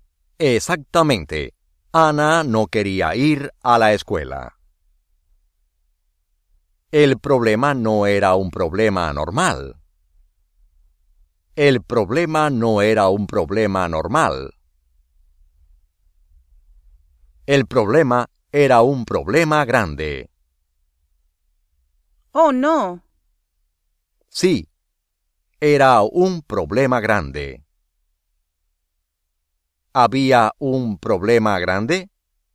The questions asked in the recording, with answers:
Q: ¿Había un problema grande?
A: Sí.